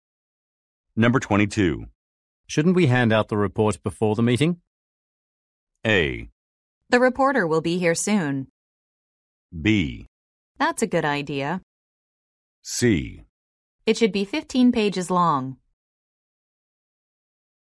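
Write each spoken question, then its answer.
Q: Shouldn't we hand out the report before the meeting?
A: B: That's a good idea.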